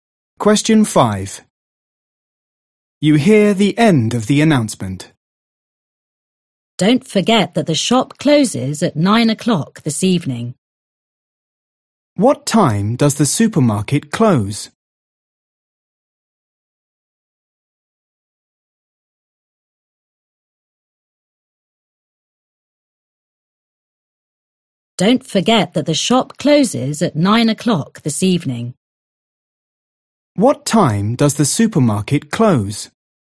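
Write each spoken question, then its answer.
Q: What time does the supermarket close?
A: 9 o'clock this evening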